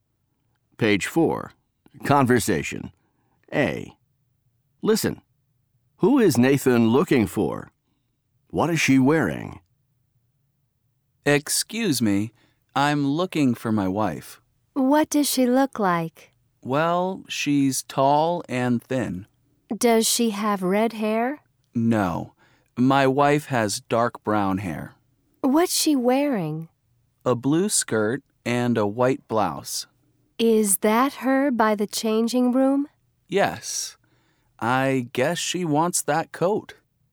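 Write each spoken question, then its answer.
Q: Who is Nathan looking for?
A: His wife

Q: What is she wearing?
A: A blue skirt and a white blouse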